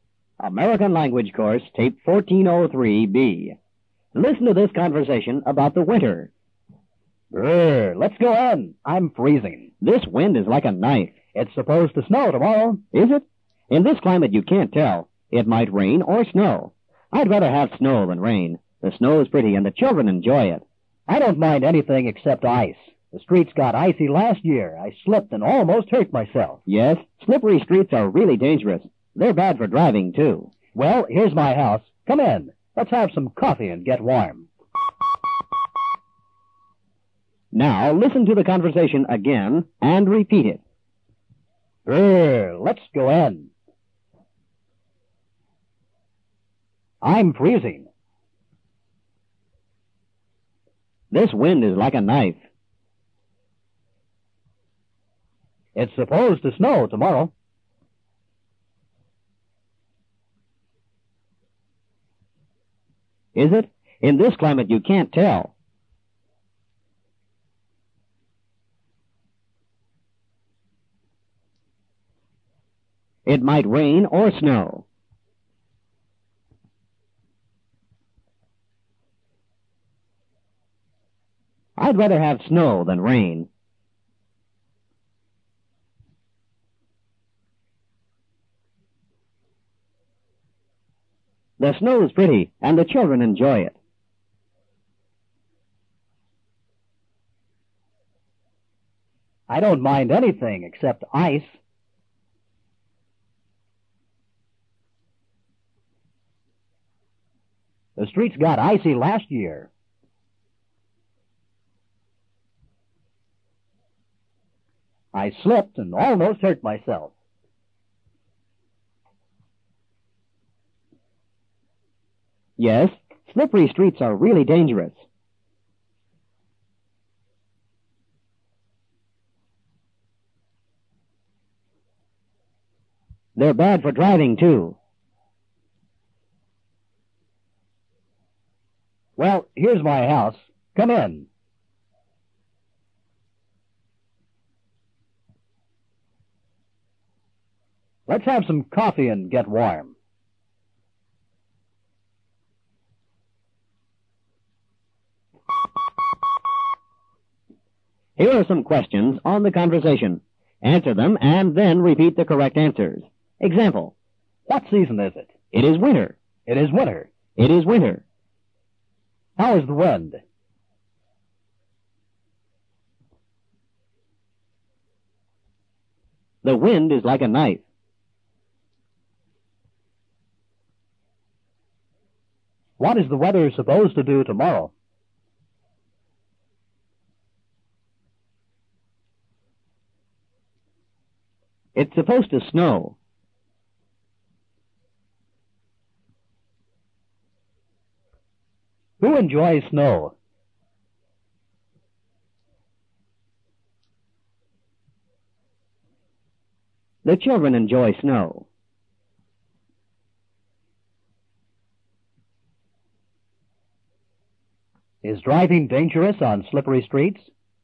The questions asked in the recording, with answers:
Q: How is the wind?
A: The wind is like a knife.

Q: What is the weather supposed to do tomorrow?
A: It's supposed to snow.

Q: Who enjoys snow?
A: The children enjoy snow.

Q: Is driving dangerous on slippery streets?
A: Yes, it is very dangerous.